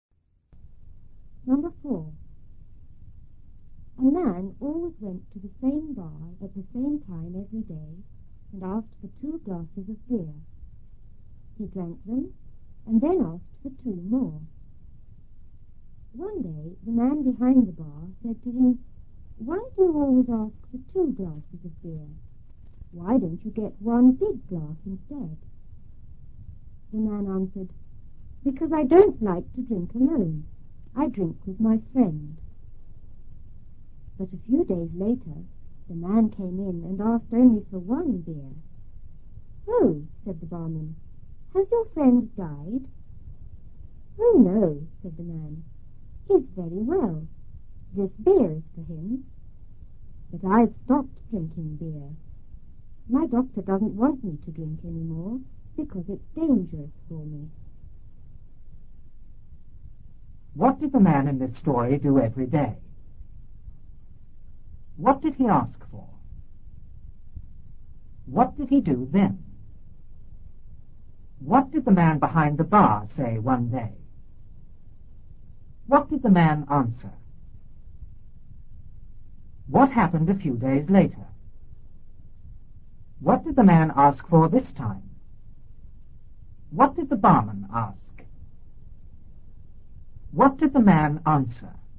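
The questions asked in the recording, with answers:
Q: What did the man in this story do every day?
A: He went to the same bar at the same time

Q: What did he ask for?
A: Two glasses of beer

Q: What did he do then?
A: He drank them and asked for two more

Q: What did the man behind the bar say one day?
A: Why do you always ask for two glasses of beer? Why don't you get one big glass instead?

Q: What did the man answer?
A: Because he didn't like to drink alone; he drank with his friend

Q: What happened a few days later?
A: The man came in and asked for only one beer

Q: What did the man ask for this time?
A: Only one beer

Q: What did the barman ask?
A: Has your friend died?

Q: What did the man answer?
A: No, his friend is very well; the beer is for him, but he has stopped drinking because his doctor says it's dangerous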